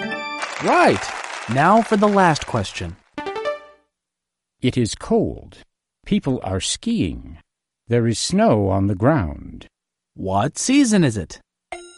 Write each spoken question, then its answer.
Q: What season is it?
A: Winter. It's winter.